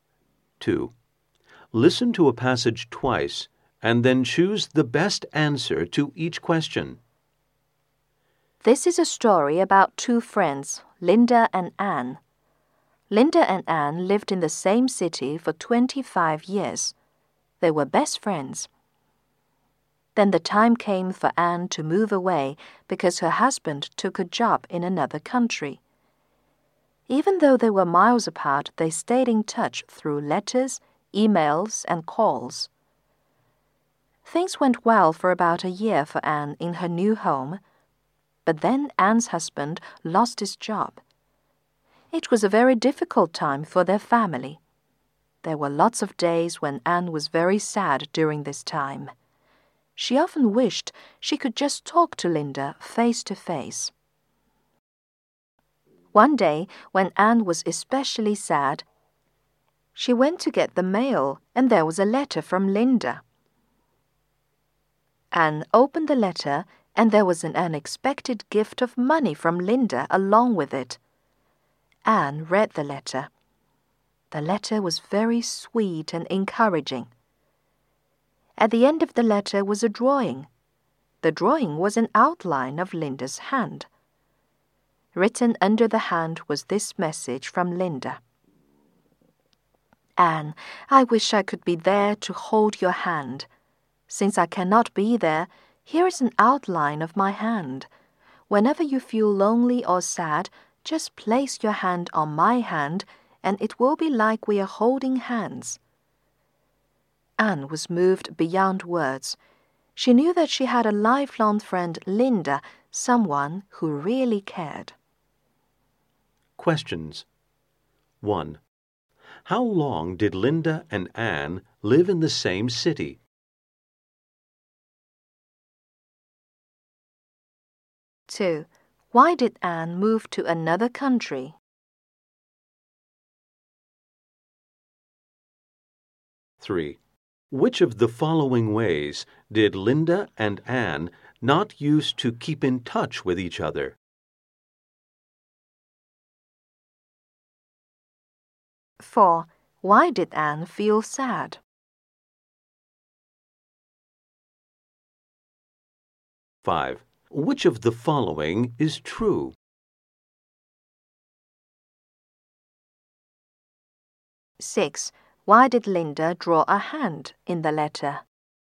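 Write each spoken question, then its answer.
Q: How long did Linda and Anne live in the same city?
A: 25 years

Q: Why did Anne move to another country?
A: Because her husband took a job in another country

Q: Why did Anne feel sad?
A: Because her husband lost his job and she missed Linda

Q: Why did Linda draw a hand in the letter?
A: So Anne could put her hand on it and feel like they were holding hands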